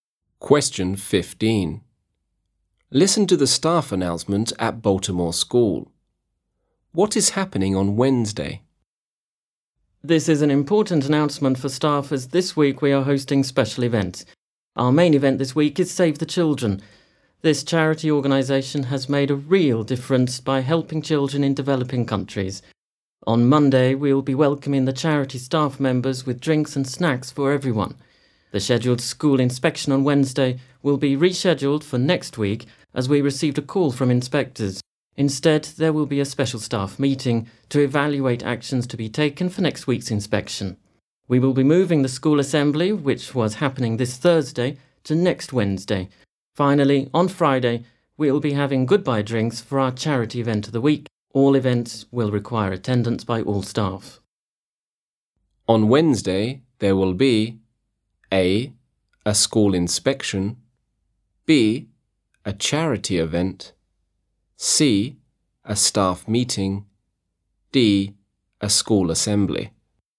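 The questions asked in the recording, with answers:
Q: What is happening on Wednesday?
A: C: A staff meeting.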